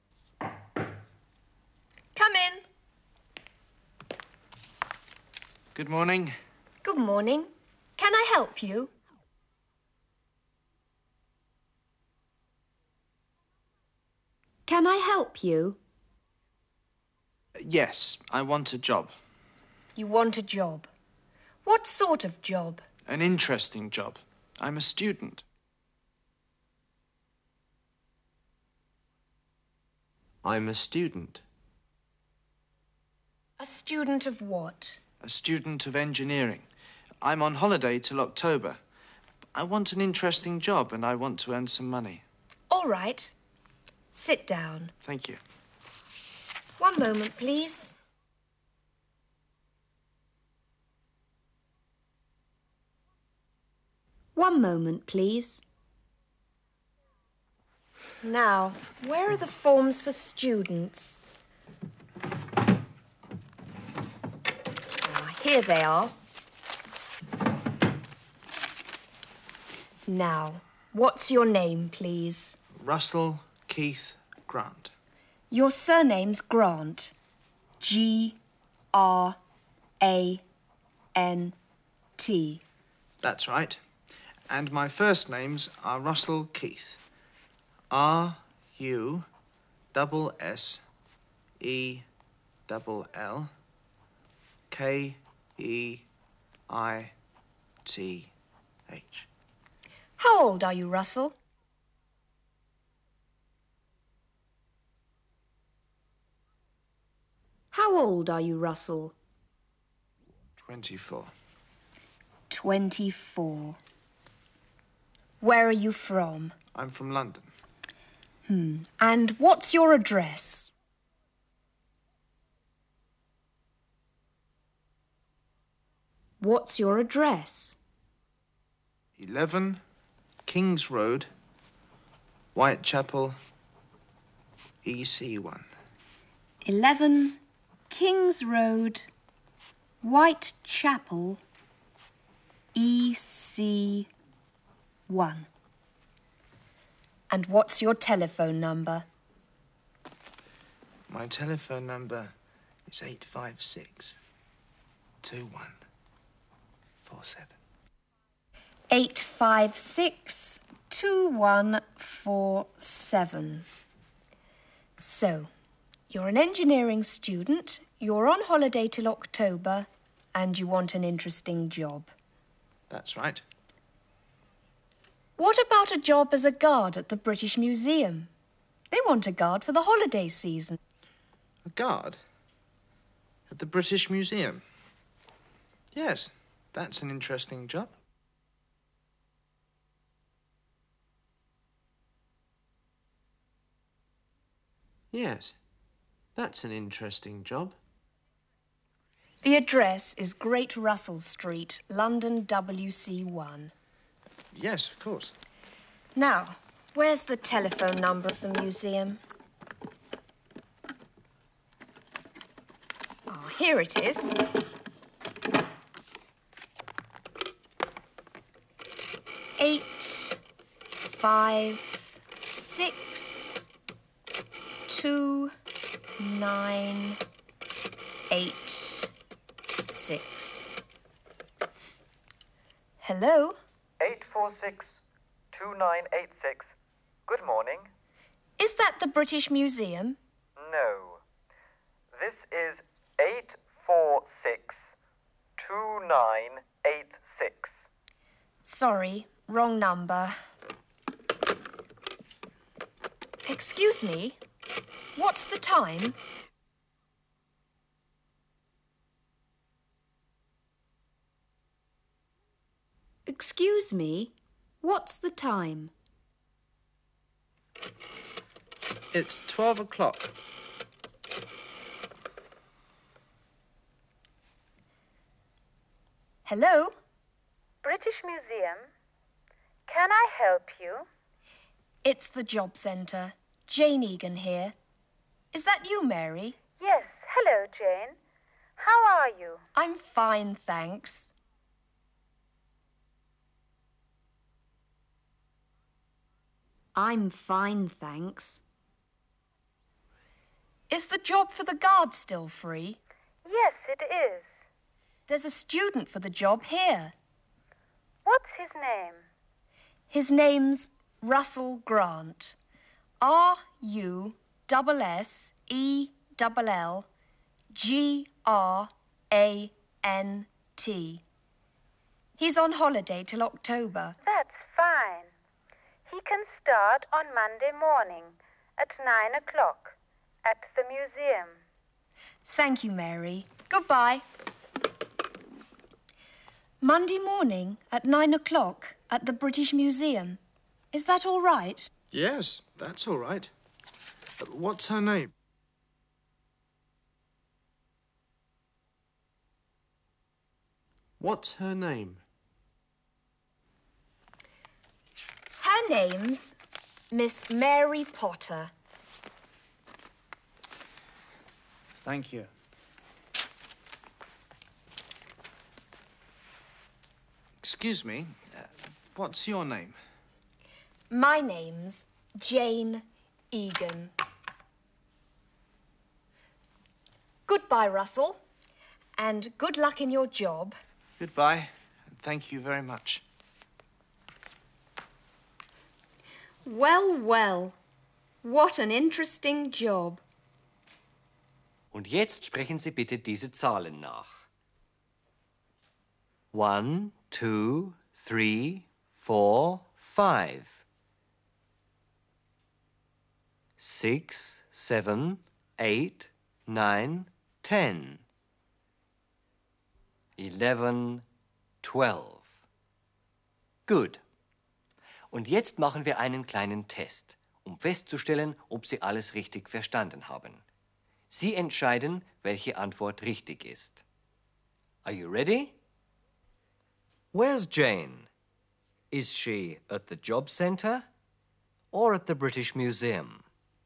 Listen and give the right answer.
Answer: She's at the job centre.